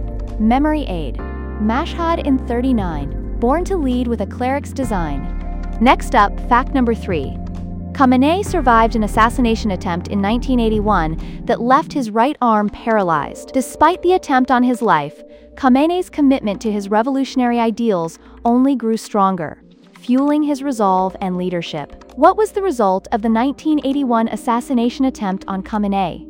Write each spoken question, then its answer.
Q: What was the result of the 1981 assassination attempt on Khamenei?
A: Correct answer, right arm paralyzed.